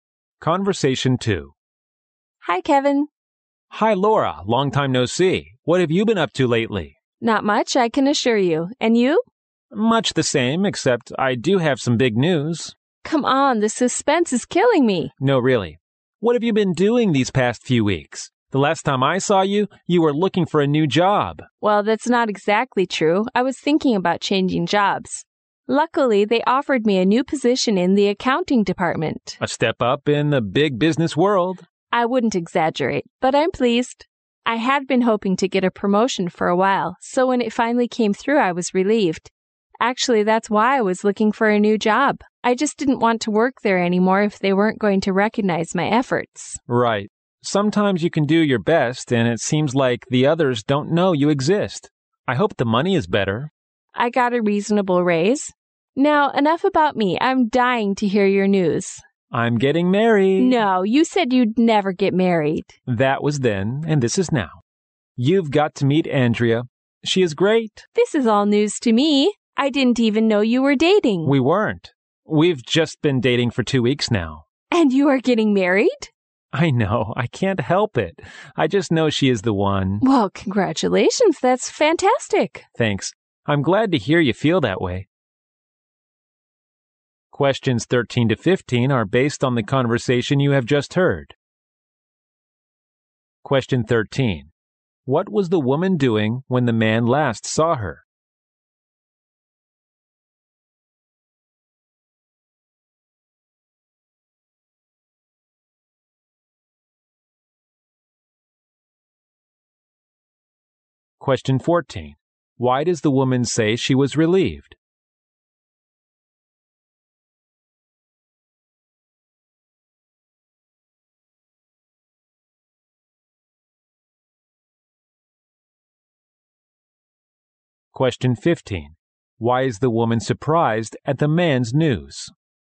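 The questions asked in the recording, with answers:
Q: What was the woman doing when the man last saw her?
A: Thinking about changing jobs.

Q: Why does the woman say she was relieved?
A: She finally got the promotion she had been hoping for.

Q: Why is the woman surprised at the man's news?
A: He had said he would never get married, and he has only been dating for two weeks.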